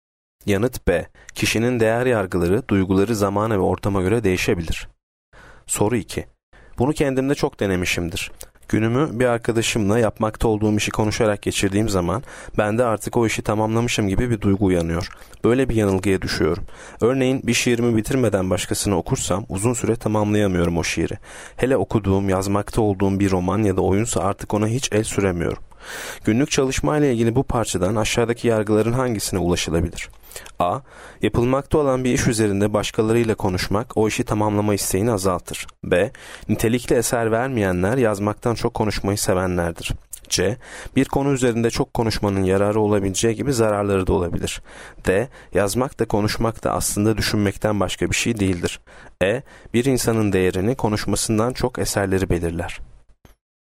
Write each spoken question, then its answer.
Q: Günlük çalışmayla ilgili bu parçadan aşağıdaki yargıların hangisine ulaşılabilir?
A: Yanıt A. Yapılmakta olan bir iş üzerinde başkalarıyla konuşmak o işi tamamlama isteğini azaltır.